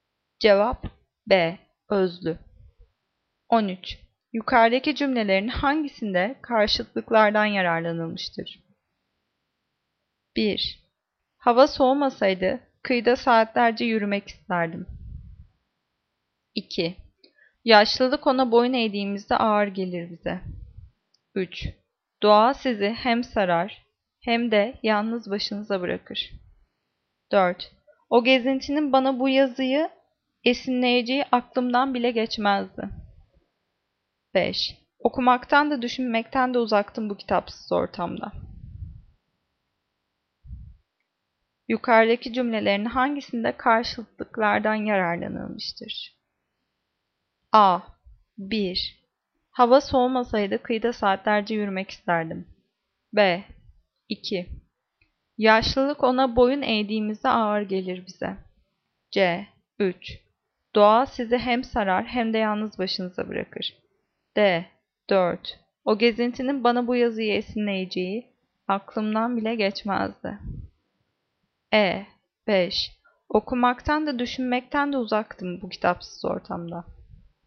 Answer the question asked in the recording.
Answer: Cevap C. 3. Doğa sizi hem sarar hem de yalnız başınıza bırakır.